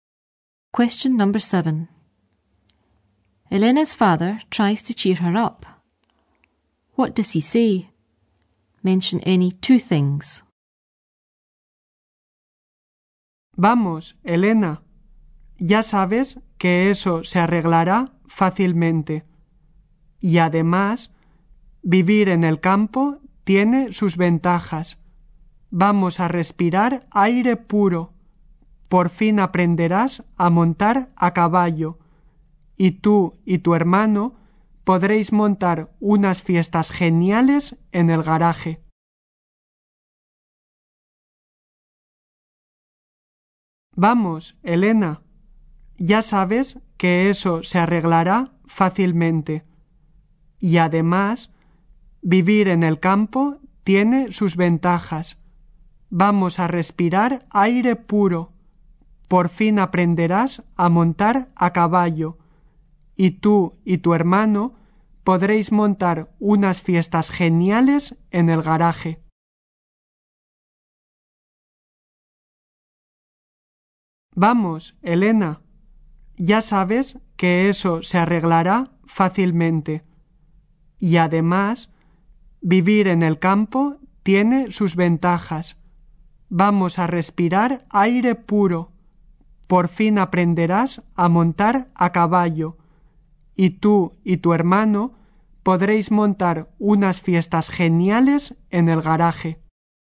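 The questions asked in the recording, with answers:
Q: What does he say? Mention any 2 things.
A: That will be easily fixed; breathe fresh air; learn to ride horses; hold great parties in the garage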